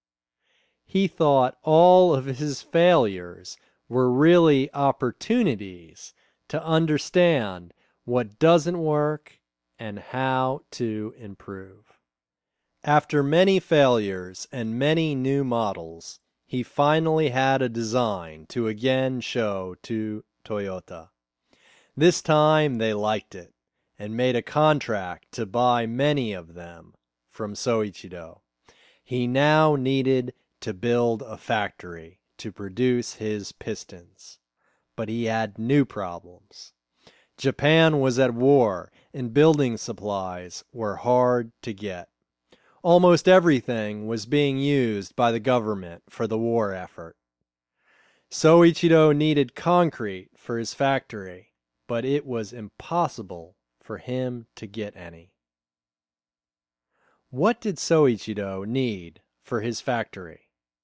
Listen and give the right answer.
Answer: He needed concrete for his factory.